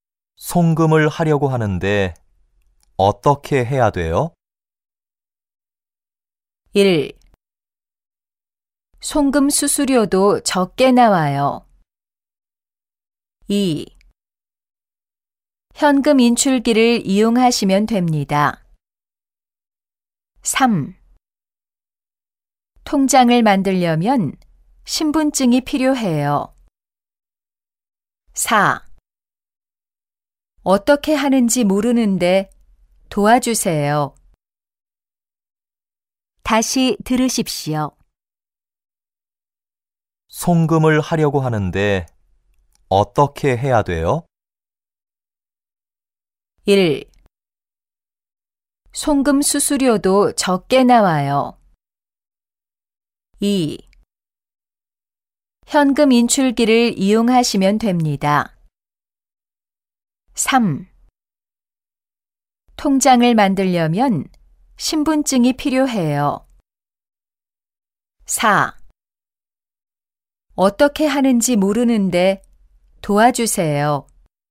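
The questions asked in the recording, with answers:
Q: 송금을 하려고 하는데 어떻게 해야 돼요?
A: 2: 현금 인출기를 이용하시면 됩니다.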